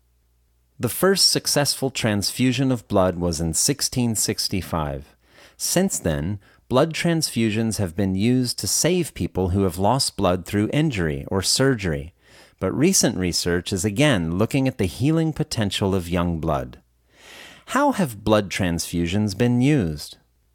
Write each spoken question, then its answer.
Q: How have blood transfusions been used?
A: Blood transfusions have been used to save people who have lost blood through injury or surgery.